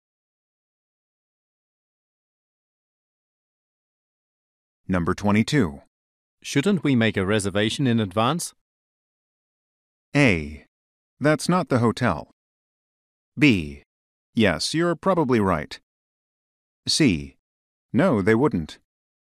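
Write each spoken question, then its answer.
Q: Shouldn't we make a reservation in advance?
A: B: Yes, you're probably right.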